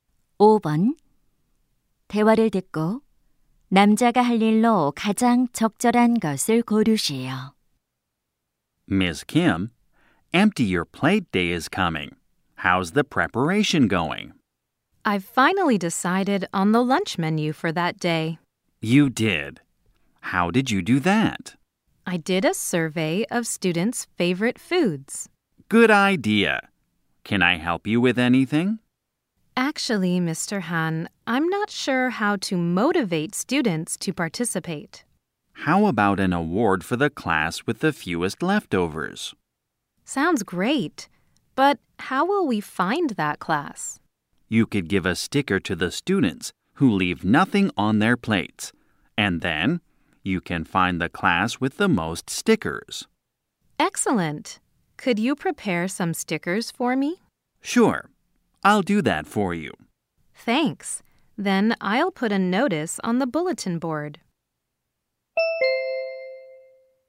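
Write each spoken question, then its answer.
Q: 대화를 듣고 남자가 할 일로 가장 적절한 것을 고르시오.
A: 스티커 준비하기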